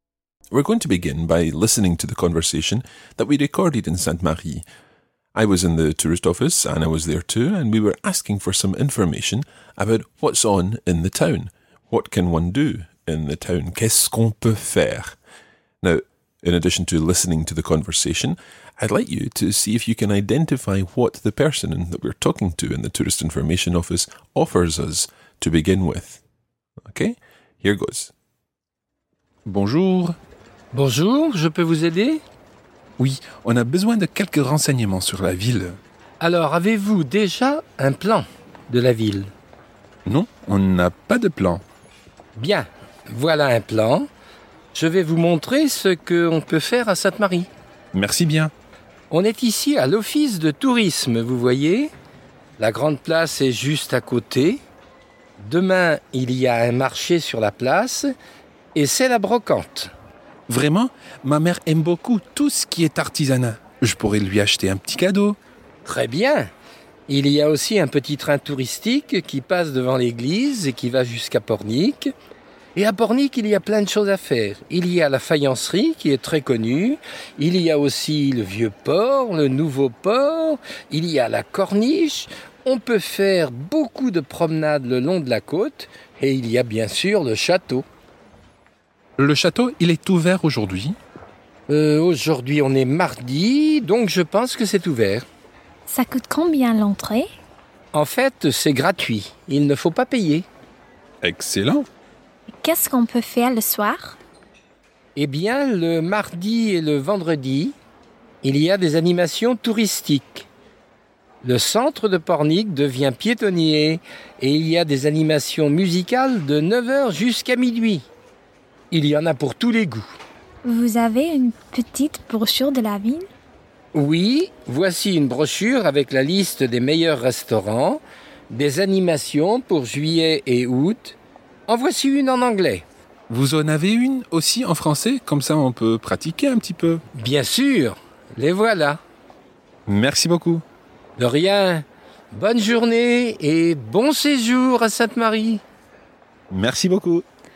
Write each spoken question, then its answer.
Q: Now, in addition to listening to the conversation, I'd like you to see if you can identify what the person that we're talking to in the tourist information office offers us to begin with.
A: He said, avez-vous déjà un plan de la ville?